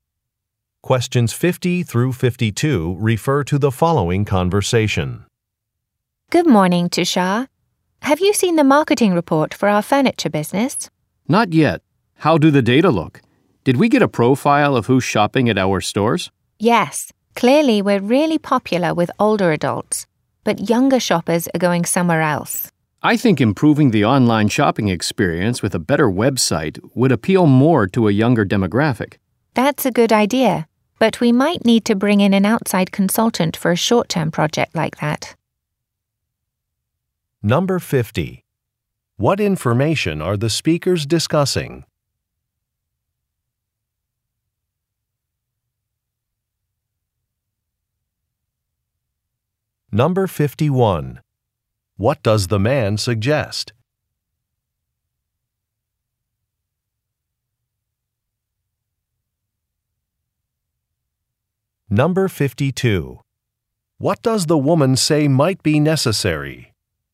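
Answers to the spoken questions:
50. A marketing report on who shops at their stores
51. Improving the website for online shopping
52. Hiring an outside consultant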